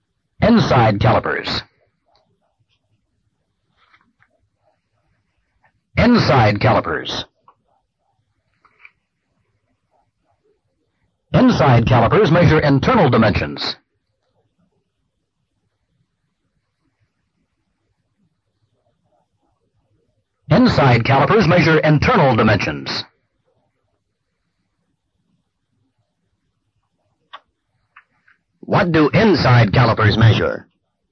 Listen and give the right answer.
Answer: Internal dimensions.